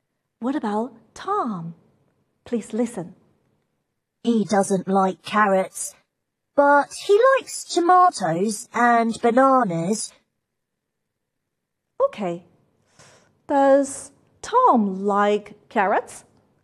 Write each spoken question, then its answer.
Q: Does Tom like carrots?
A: No, he doesn't.